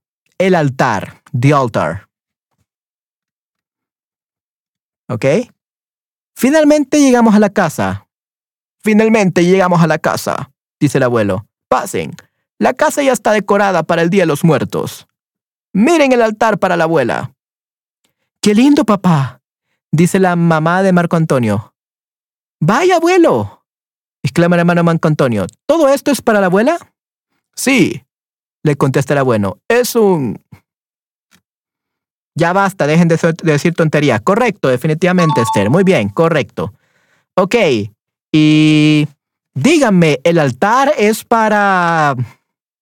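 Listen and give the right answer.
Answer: Para la abuela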